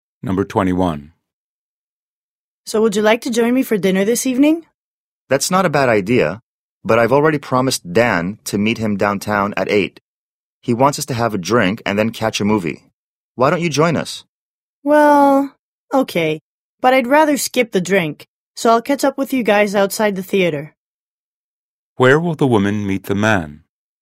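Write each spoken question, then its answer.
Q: Where will the woman meet the man?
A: Outside the theater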